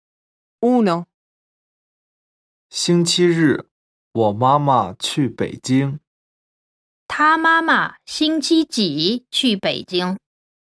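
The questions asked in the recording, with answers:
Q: 他妈妈星期几去北京?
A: 星期日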